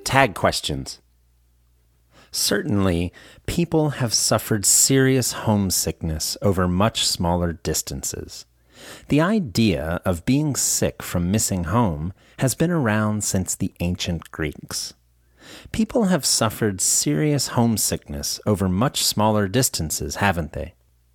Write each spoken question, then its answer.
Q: People have suffered serious homesickness over much smaller distances, haven't they?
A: Yes, they have. They've suffered serious homesickness over much smaller distances.